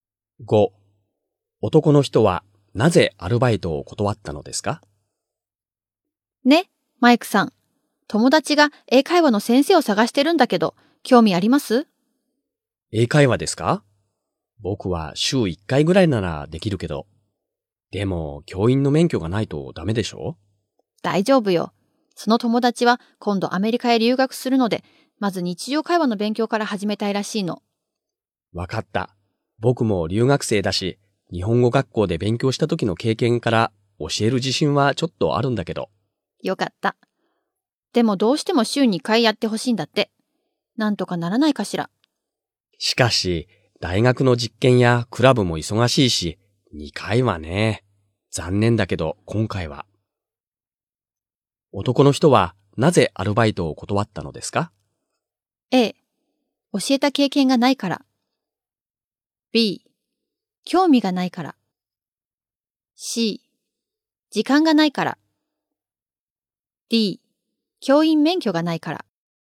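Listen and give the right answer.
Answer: C: 時間がないから。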